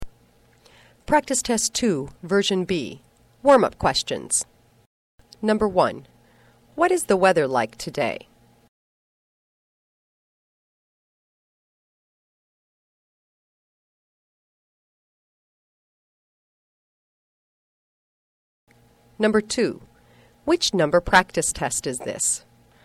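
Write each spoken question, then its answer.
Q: Which number practice test is this?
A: Practice Test 2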